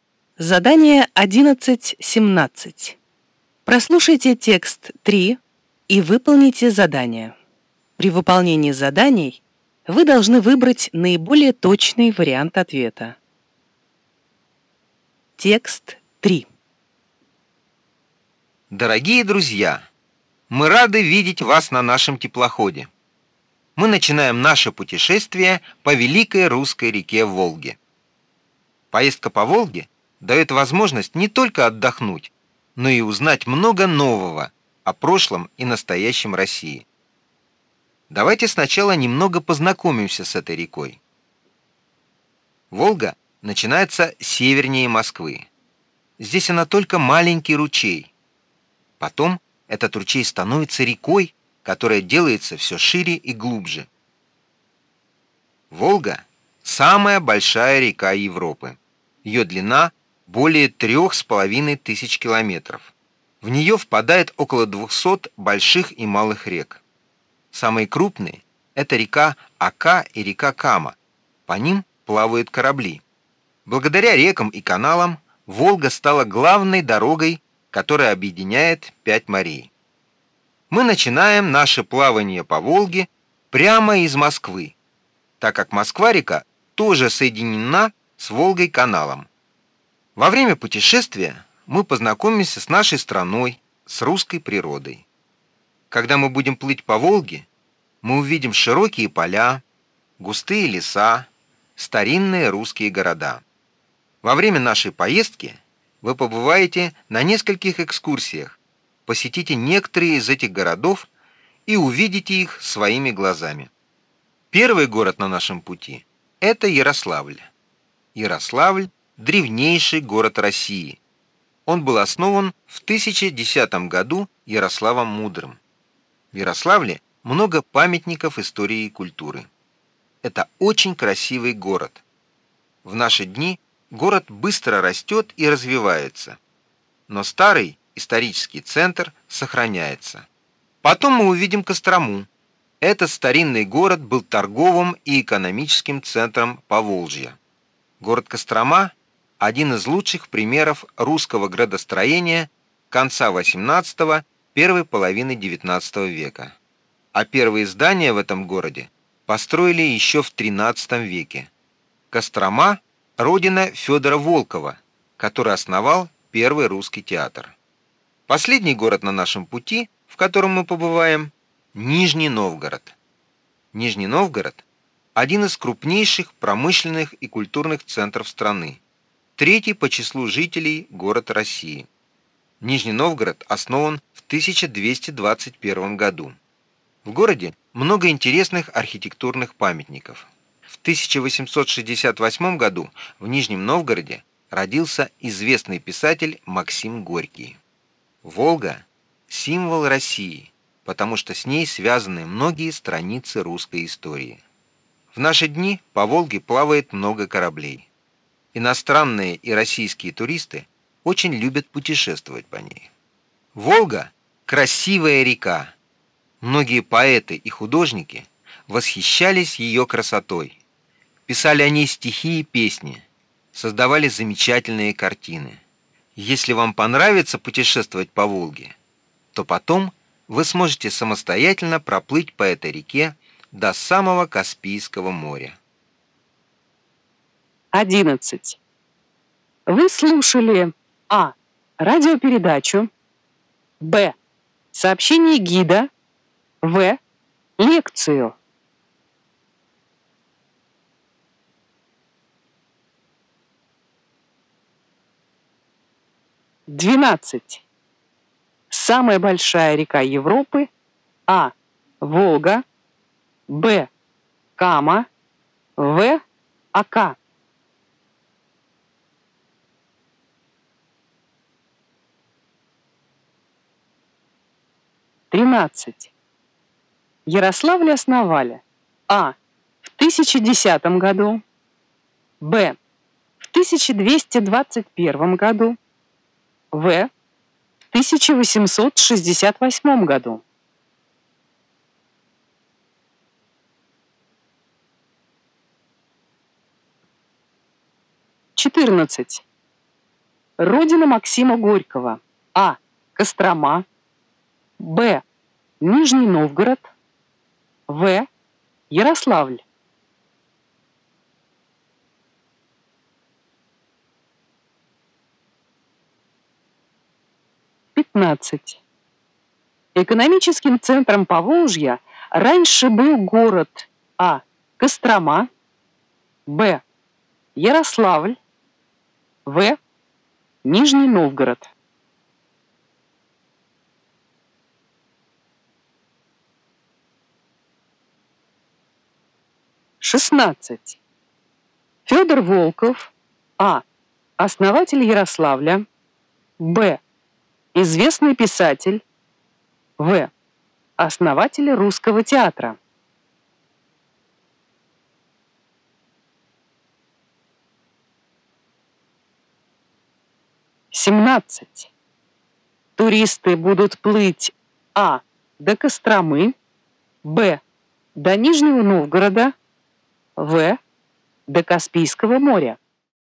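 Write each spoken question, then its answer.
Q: Вы слушали а. радиопередачу, б. сообщение гида, в. лекцию.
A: Б: сообщение гида

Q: Самая большая река Европы. А. Волга. Б. Кама. В. Ака.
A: А: Волга

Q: Ярославль основали. А. В 1010 году. Б. В 1221 году. В. В 1868 году.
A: А: В 1010 году

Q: Родина Максима Горького. А. Кострома. Б. Нижний Новгород. В. Ярославль.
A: Б: Нижний Новгород

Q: Экономическим центром Поволжья раньше был город А. Кострома, Б. Ярославль, В. Нижний Новгород.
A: А: Кострома

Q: Федор Волков, А. Основатель Ярославля, Б. Известный писатель, В. Основатель русского театра.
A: В: Основатель русского театра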